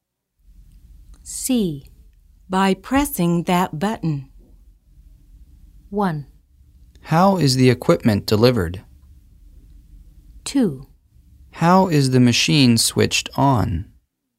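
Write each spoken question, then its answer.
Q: By pressing that button.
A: 2: How is the machine switched on?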